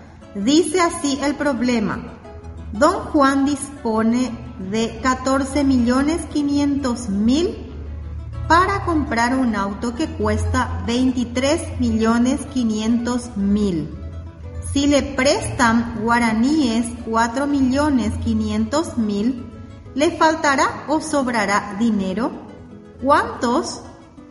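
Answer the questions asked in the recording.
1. Le faltará
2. 4.500.000 guaraníes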